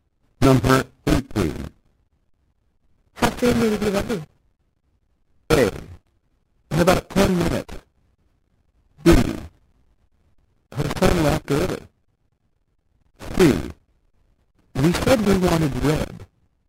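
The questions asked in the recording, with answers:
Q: How soon will you be ready?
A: A: In about 10 minutes.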